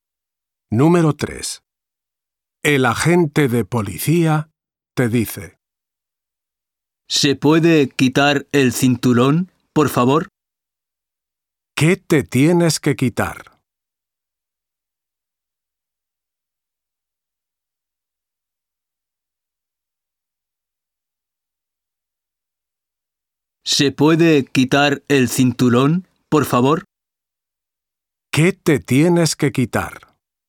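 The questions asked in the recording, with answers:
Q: ¿Qué te tienes que quitar?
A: el cinturón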